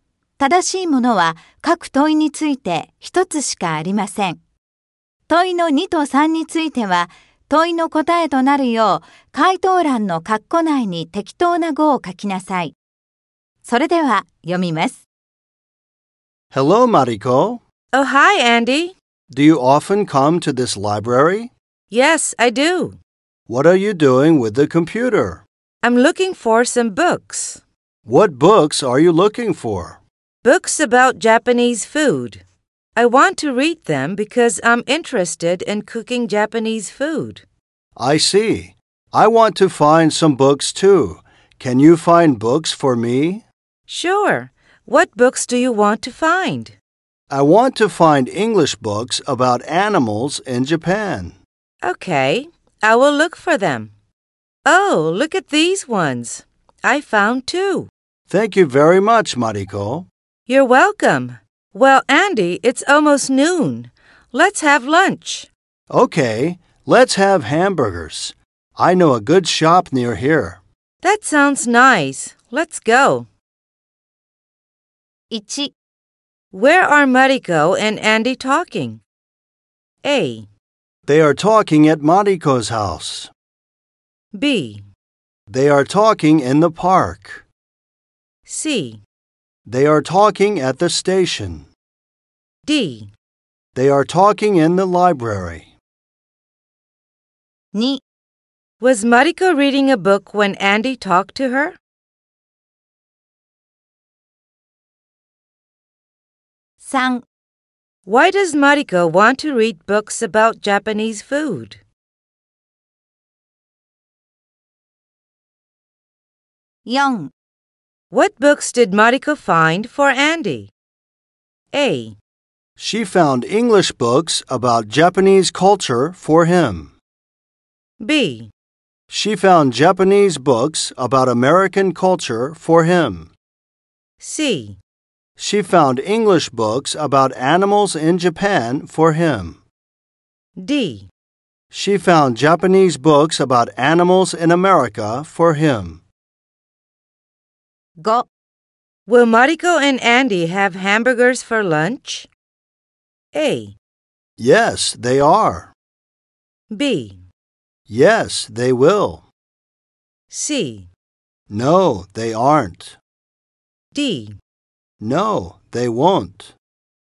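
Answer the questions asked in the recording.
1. D: They are talking in the library.
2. No, she wasn't. She was looking for books with the computer.
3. Because she is interested in cooking Japanese food.
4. C: She found English books about animals in Japan for him.
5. B: Yes, they will.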